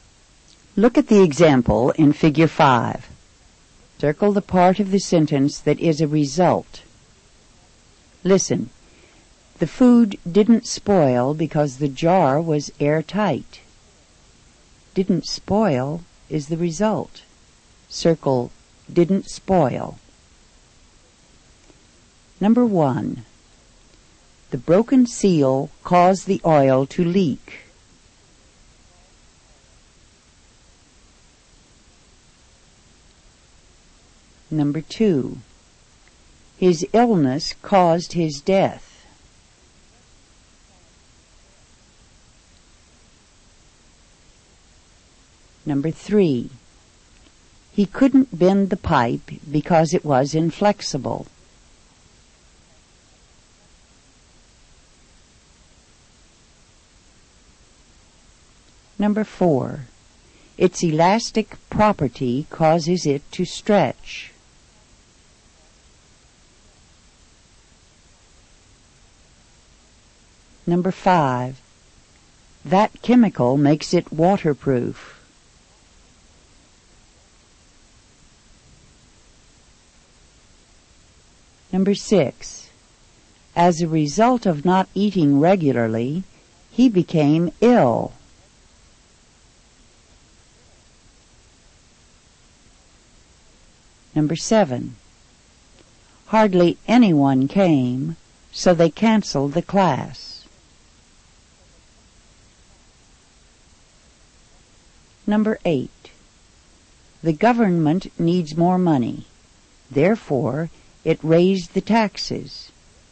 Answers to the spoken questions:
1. Number one is oil to leak.
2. Number two is death.
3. Number three is couldn't bend the pipe.
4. Number four is to stretch.
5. Number five is waterproof.
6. Number six is became ill.
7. Number seven is canceled the class.
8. Number eight is raised taxes.